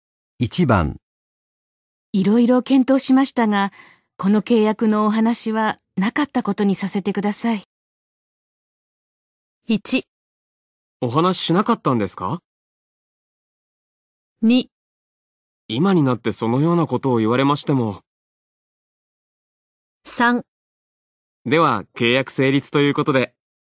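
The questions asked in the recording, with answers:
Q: いろいろ検討しましたが、この契約のお話はなかったことにさせてください。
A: 2: 今になってそのようなことを言われましても。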